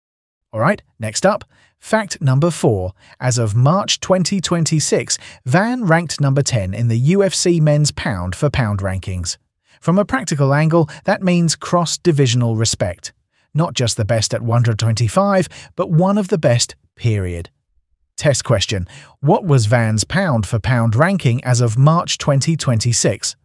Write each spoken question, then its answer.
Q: what was Van's pound for pound ranking as of March 2026?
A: number 10.